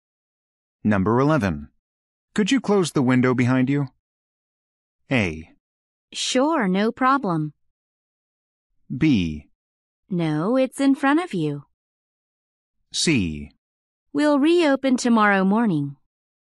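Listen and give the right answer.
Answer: A: Sure, no problem.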